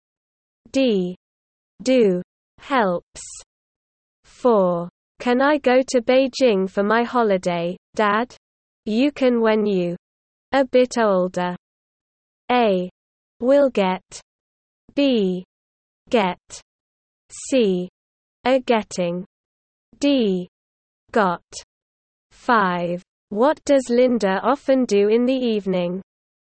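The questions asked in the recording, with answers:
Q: Can I go to Beijing for my holiday, Dad? You can when you a bit older.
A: B: Get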